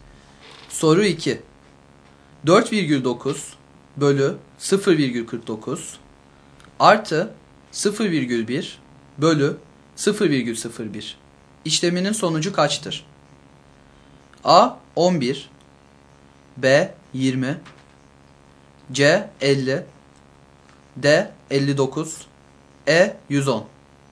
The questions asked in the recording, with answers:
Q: İşleminin sonucu kaçtır?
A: Doğru yanıt B şıkkı.